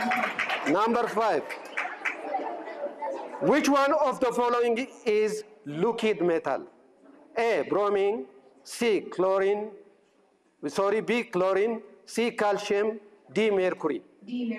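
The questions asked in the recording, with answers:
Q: Which one of the following is liquid metal?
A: D: mercury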